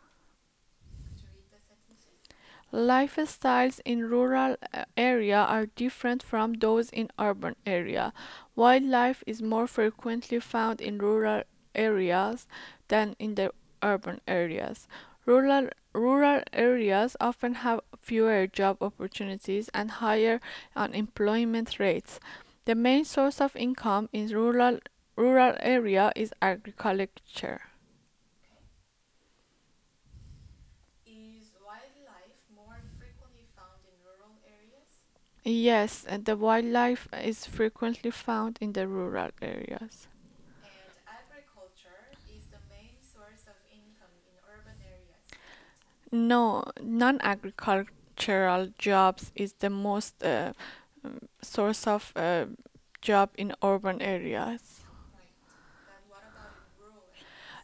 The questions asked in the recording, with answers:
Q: Is wildlife more frequently found in rural areas?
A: Yes, and the wildlife is frequently found in the rural areas.

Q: Then what about in rural areas?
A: And in the rural areas, the most frequent job is related to agriculture.